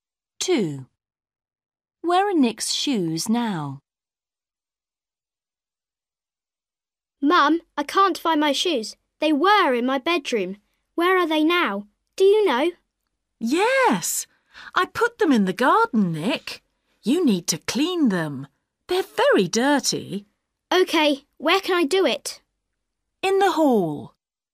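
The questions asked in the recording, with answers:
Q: Where are Nick's shoes now?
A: In the garden.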